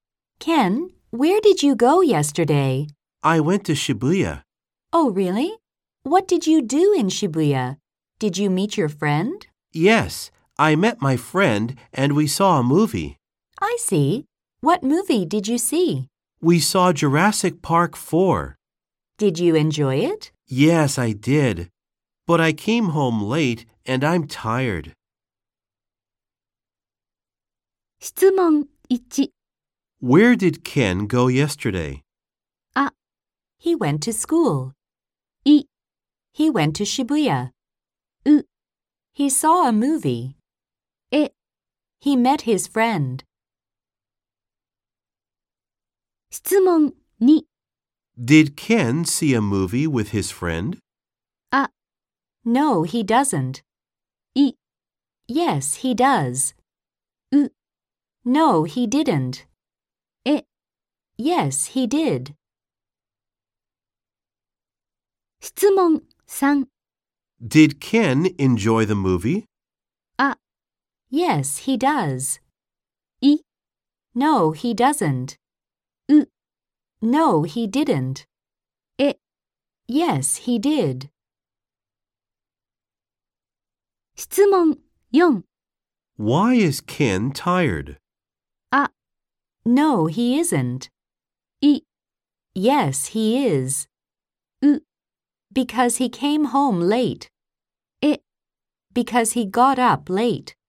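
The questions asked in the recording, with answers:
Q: Where did Ken go yesterday?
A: い: He went to Shibuya.

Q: Did Ken see a movie with his friend?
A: え: Yes, he did.

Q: Did Ken enjoy the movie?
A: え: Yes, he did.

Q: Why is Ken tired?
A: う: Because he came home late.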